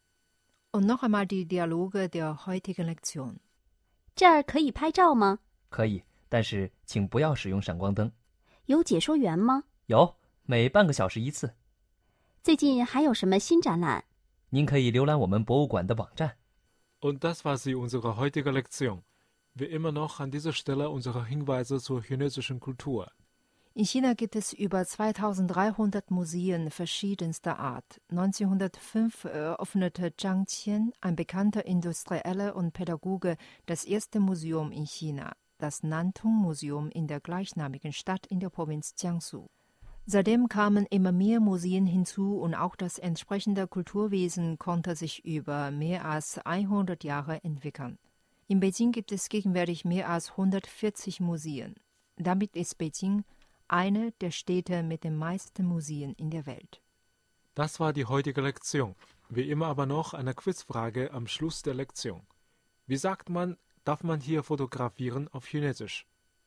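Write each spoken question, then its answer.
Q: Wie sagt man, darf man hier fotografieren auf Chinesisch?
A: 这儿可以拍照吗?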